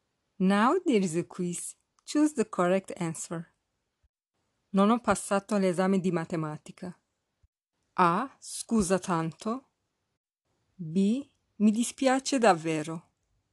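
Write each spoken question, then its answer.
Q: Non ho passato l'esame di matematica.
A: B: Mi dispiace davvero.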